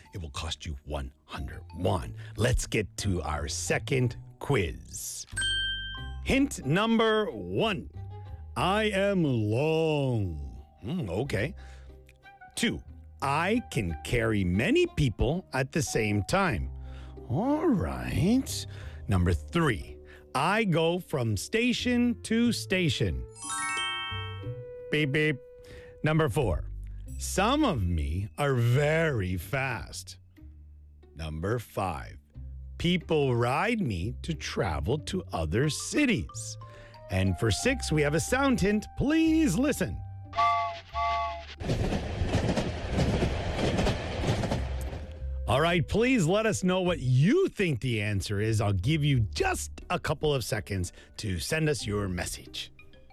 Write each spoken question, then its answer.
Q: All right, please let us know what you think the answer is.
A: All right, if you said a train, you would be correct.